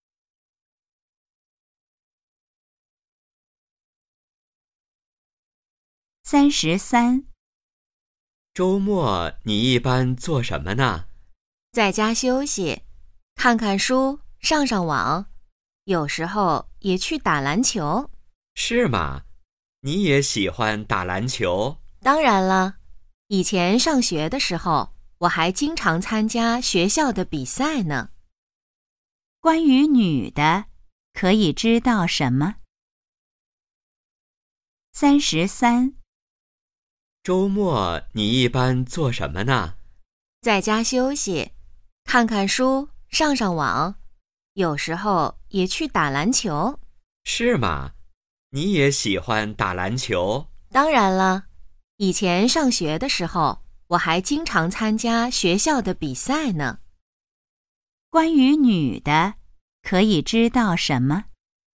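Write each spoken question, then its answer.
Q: 关于女的,可以知道什么?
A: 她喜欢打篮球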